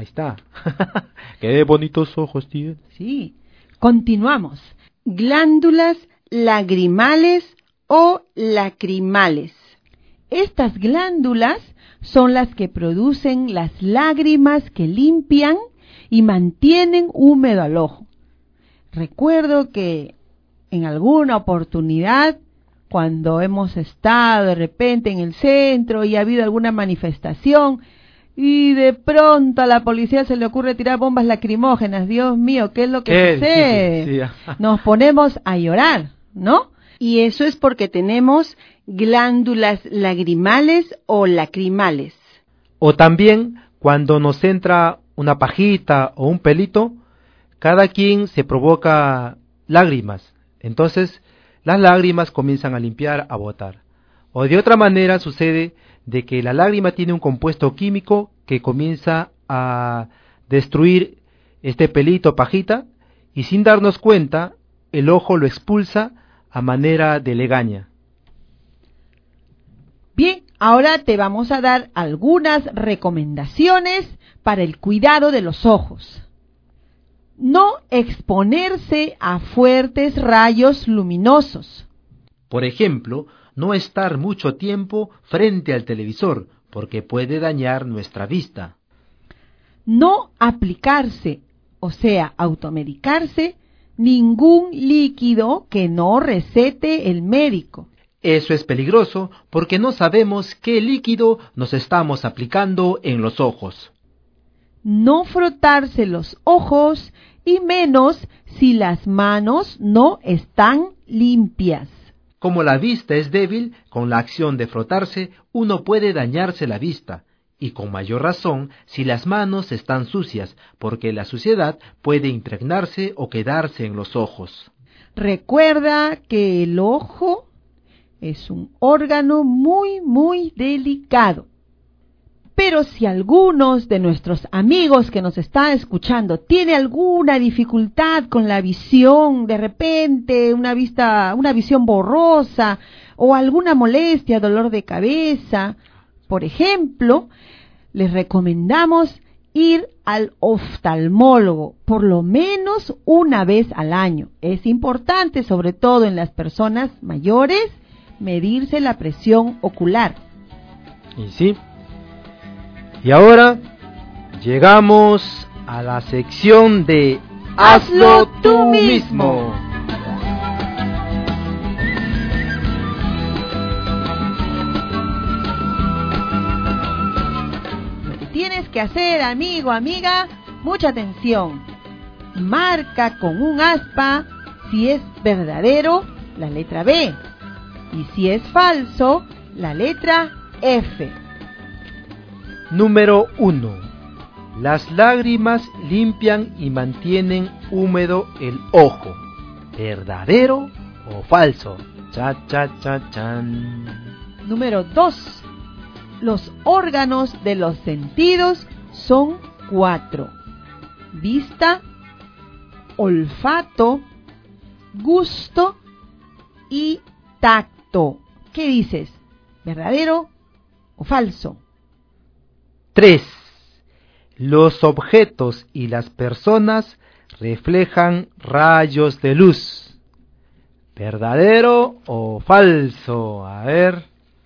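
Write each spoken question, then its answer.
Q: Las lágrimas limpian y mantienen húmedo el ojo.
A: Verdadero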